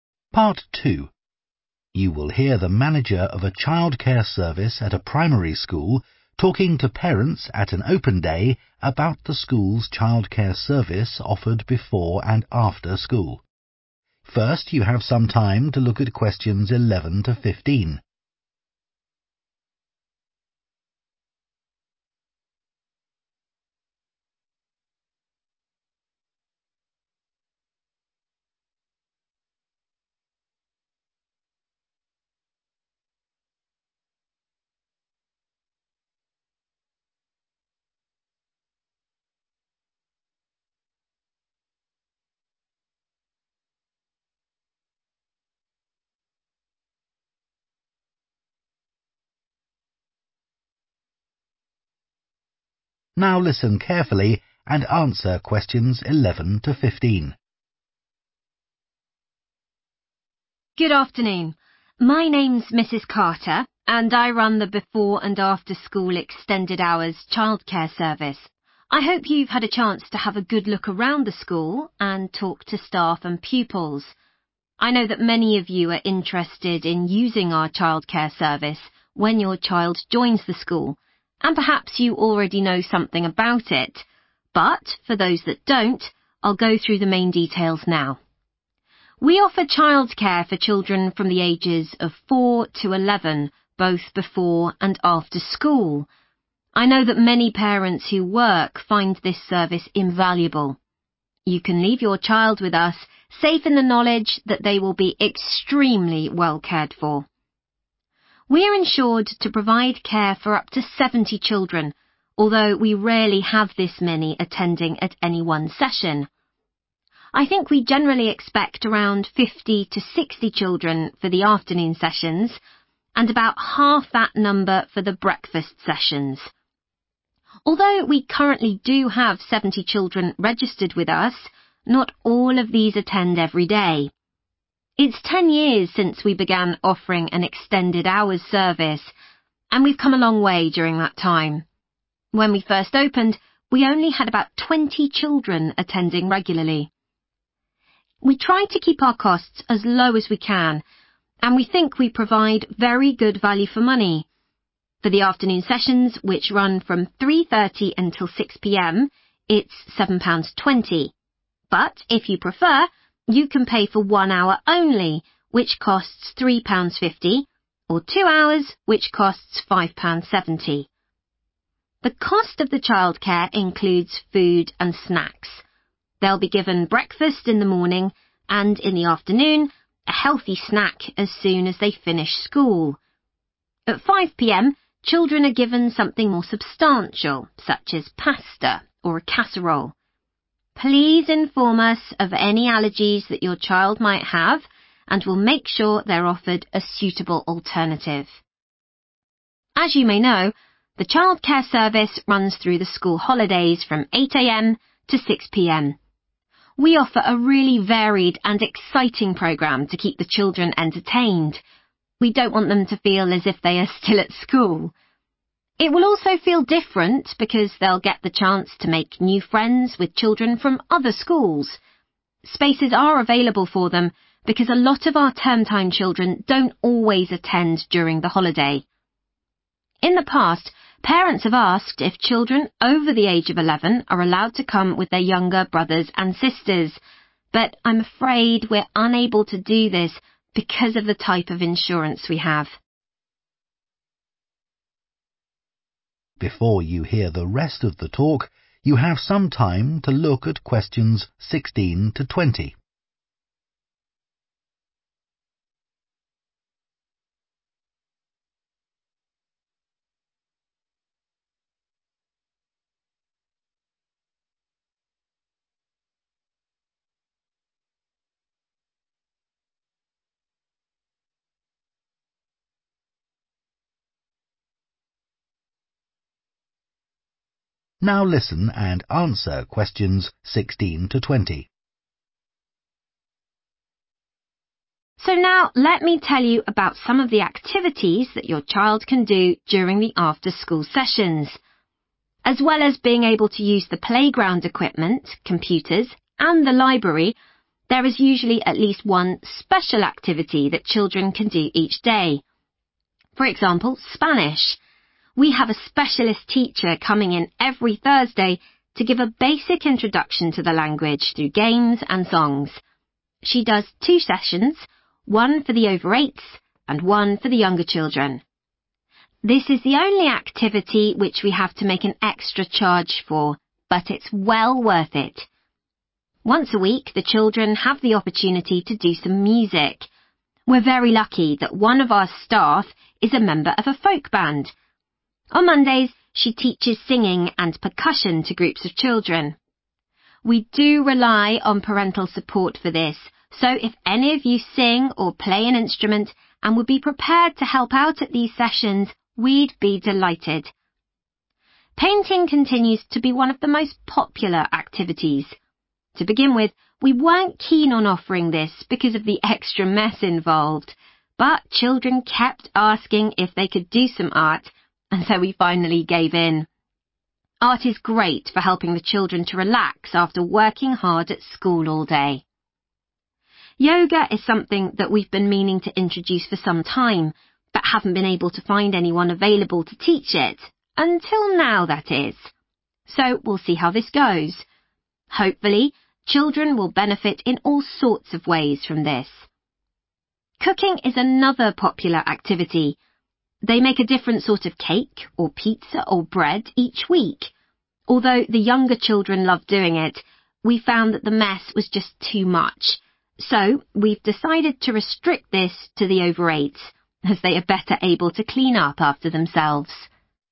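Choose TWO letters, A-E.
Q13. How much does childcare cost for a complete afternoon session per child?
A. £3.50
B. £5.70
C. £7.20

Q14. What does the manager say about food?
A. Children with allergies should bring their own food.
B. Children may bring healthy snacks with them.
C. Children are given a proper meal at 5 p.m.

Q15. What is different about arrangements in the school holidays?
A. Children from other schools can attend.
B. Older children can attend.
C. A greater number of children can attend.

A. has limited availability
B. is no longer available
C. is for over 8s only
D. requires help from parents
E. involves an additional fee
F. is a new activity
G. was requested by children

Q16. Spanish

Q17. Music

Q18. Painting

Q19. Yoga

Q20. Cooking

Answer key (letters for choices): 13C, 14C, 15A, 16E, 17D, 18G, 19F, 20C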